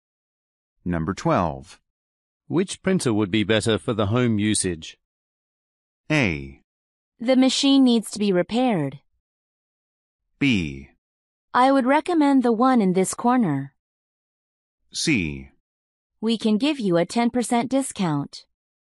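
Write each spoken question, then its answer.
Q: Which printer would be better for the home usage?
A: B: I would recommend the one in this corner.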